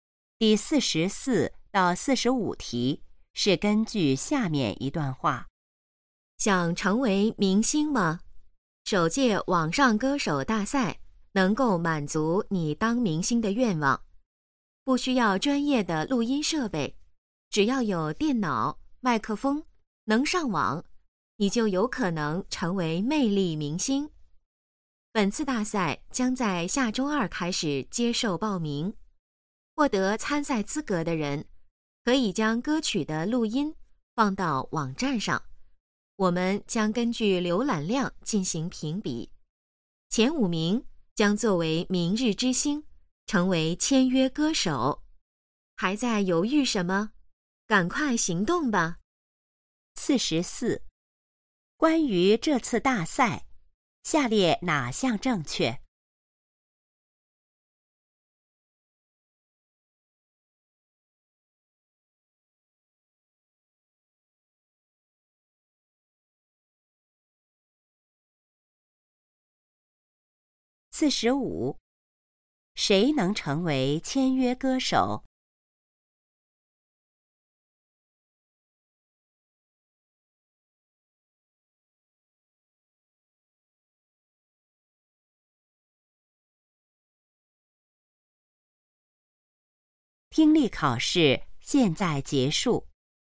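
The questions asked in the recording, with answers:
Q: 谁能成为签约歌手?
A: 浏览量排名前五名的参赛者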